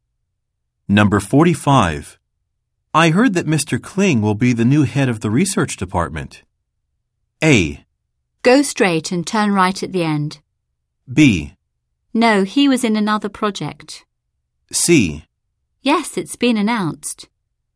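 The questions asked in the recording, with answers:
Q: I heard that Mr. Kling will be the new head of the research department.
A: C: Yes, it's been announced.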